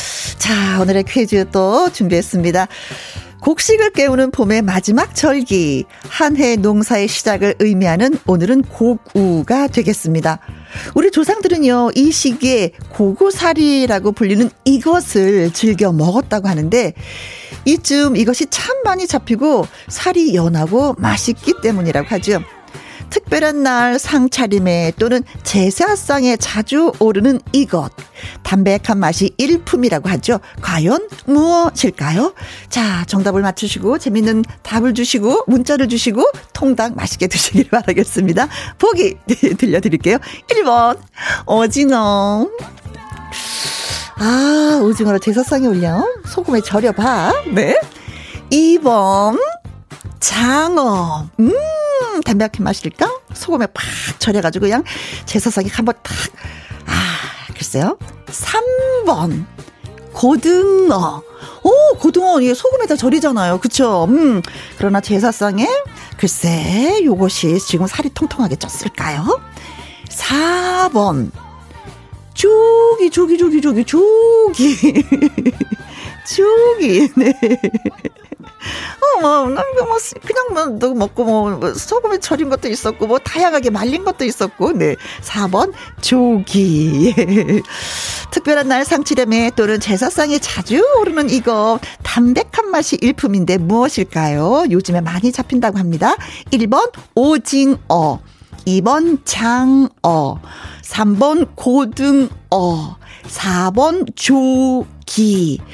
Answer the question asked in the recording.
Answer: 정답은 조기가 되겠습니다.